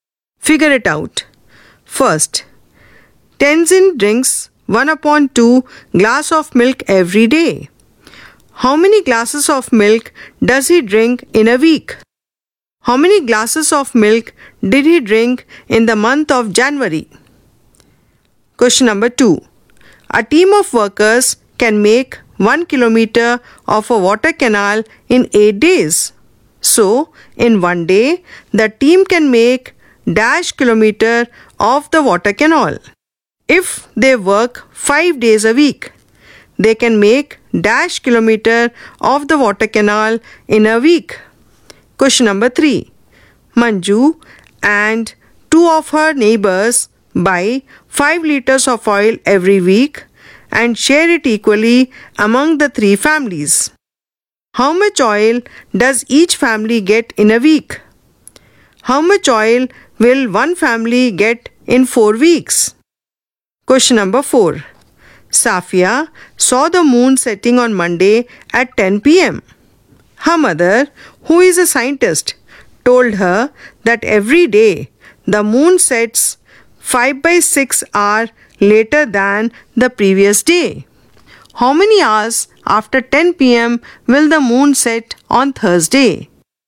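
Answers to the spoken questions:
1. 7/2 glasses (3 1/2)
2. 31/2 glasses (15 1/2)
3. 1/8 kilometer
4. 5/8 kilometer
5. 5/3 liters
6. 20/3 liters
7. 5/2 hours (2 1/2 hours)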